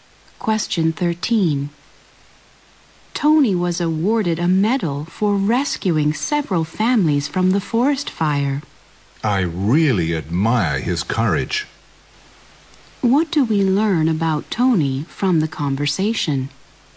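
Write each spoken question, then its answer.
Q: What do we learn about Tony from the conversation?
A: He bravely rescued several families from a forest fire and got a medal.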